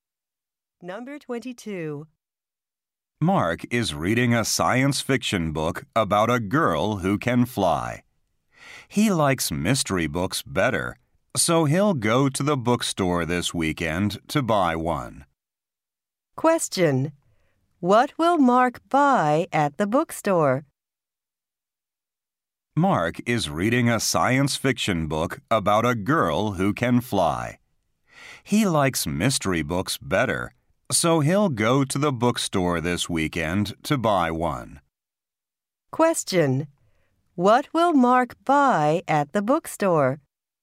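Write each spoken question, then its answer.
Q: What will Mark buy at the bookstore?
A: A mystery book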